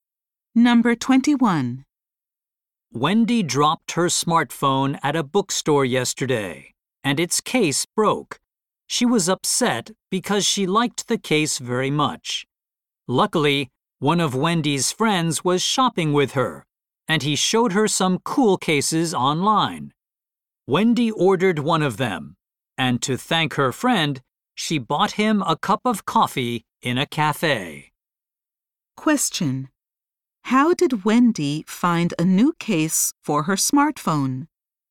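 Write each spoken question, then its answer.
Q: How did Wendy find a new case for her smartphone?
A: Her friend showed her some cases online.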